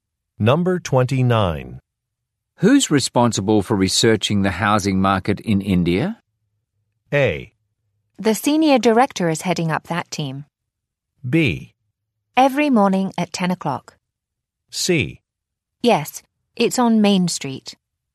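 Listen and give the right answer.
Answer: A: The senior director is heading up that team.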